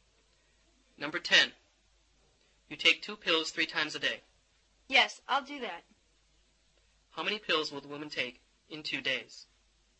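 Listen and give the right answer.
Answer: 12 pills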